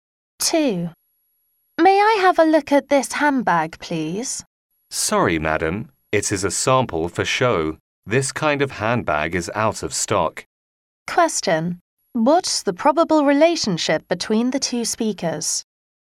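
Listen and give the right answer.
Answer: Shop assistant and customer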